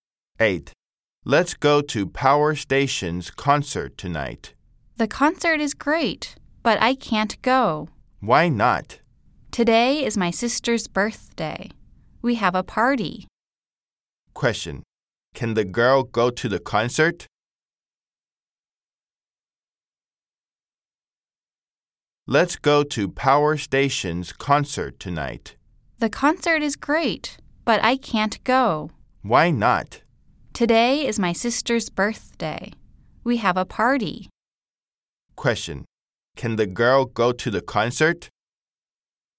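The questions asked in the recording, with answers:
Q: Question, can the girl go to the concert?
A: No, it's her sister's birthday party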